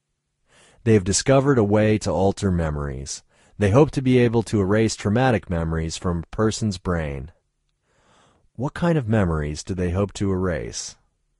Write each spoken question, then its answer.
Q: What kind of memories do they hope to erase?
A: They hope to erase traumatic memories.